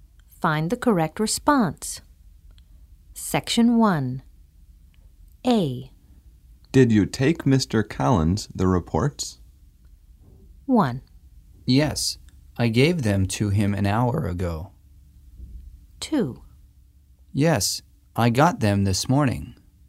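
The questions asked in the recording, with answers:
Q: Did you take Mr. Collins the reports?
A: 1: Yes, I gave them to him an hour ago.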